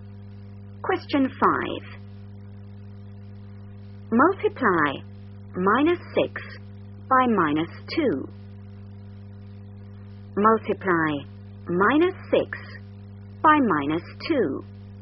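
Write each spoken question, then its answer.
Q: Multiply minus 6 by minus 2.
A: 12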